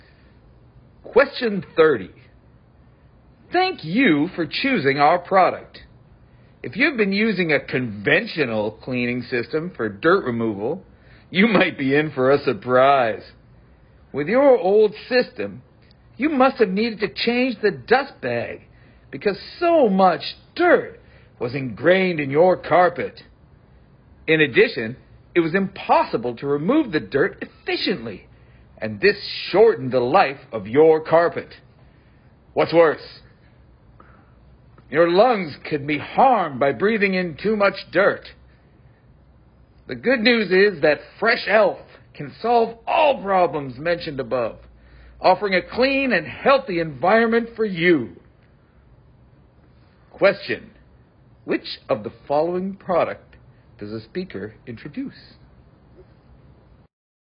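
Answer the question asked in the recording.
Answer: Fresh Elf, a cleaning system for removing dirt from carpets (a vacuum cleaner)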